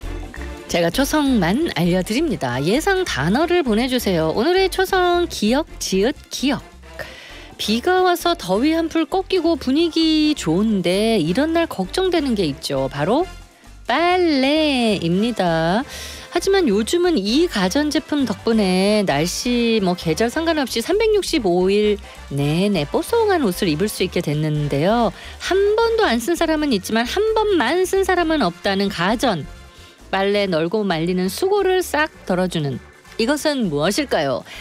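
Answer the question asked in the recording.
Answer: 건조기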